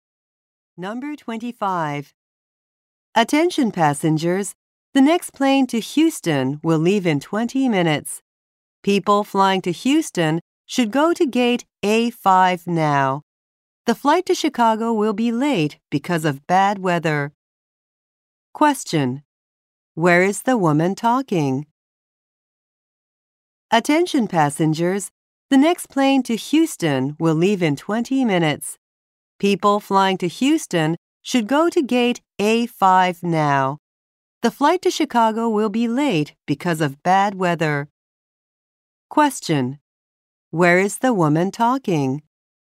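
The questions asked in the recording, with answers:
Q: Where is the woman talking?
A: At an airport.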